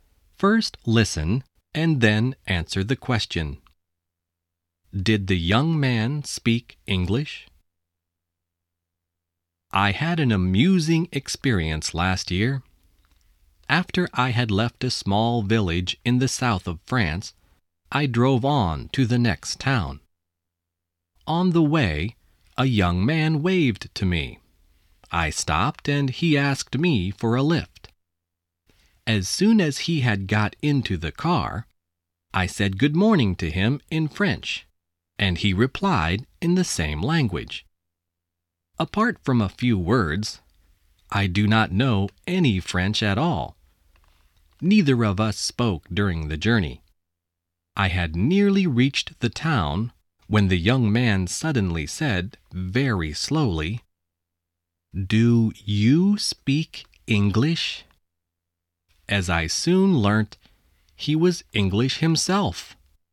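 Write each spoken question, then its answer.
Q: Did the young man speak English?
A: Yes, he was English himself.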